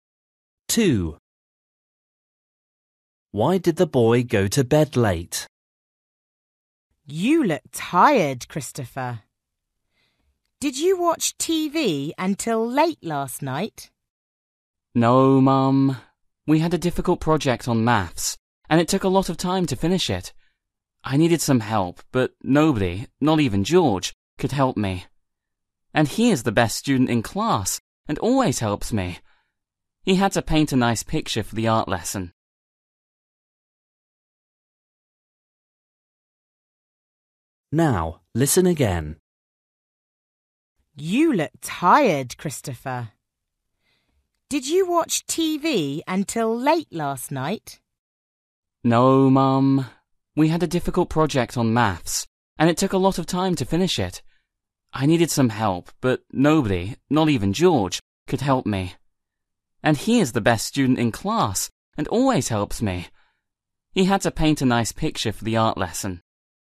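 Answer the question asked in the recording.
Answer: He had a difficult maths project to finish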